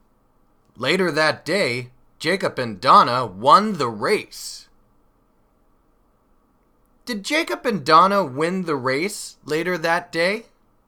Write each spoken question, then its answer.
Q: Did Jacob and Donna win the race later that day?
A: Yes, that's right. Later that day, Jacob and Donna won the race.